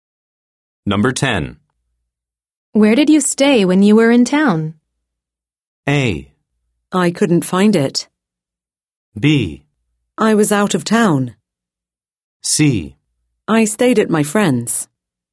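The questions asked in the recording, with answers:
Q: Where did you stay when you were in town?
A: C: I stayed at my friend's.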